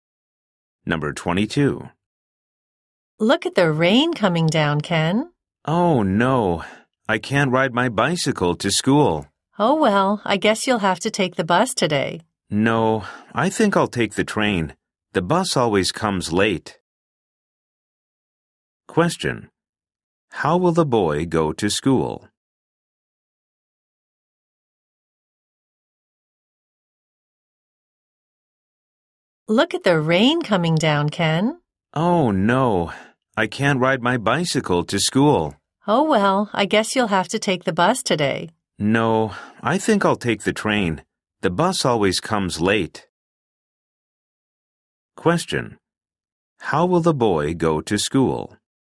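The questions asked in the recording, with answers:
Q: How will the boy go to school?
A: By train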